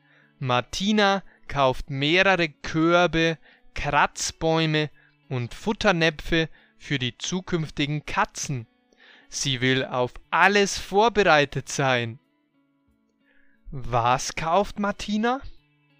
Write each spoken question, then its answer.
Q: Was kauft Martina?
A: Sie kauft mehrere Körbe, Kratzbäume und Futternäpfe für die zukünftigen Katzen.